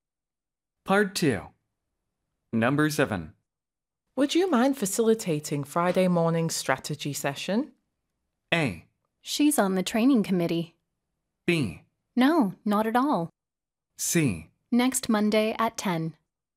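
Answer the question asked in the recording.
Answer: B: No, not at all.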